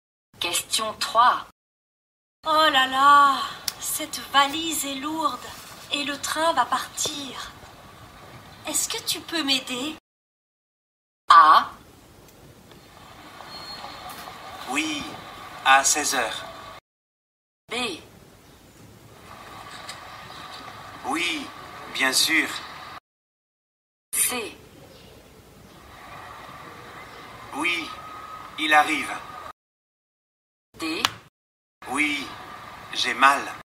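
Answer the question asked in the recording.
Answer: B: Oui, bien sûr.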